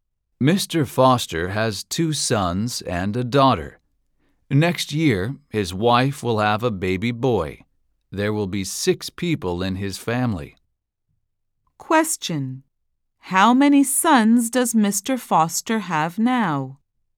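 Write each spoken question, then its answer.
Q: How many sons does Mr. Foster have now?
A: Two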